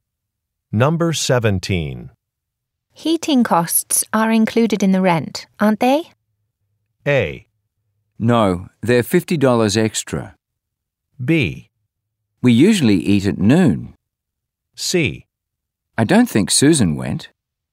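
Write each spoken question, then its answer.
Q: Heating costs are included in the rent, aren't they?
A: A: No, they're $50 extra.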